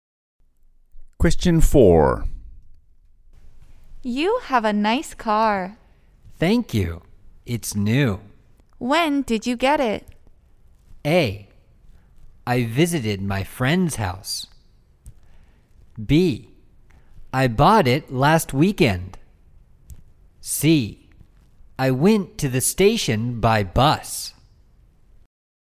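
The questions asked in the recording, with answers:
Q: When did you get it?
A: B: I bought it last weekend.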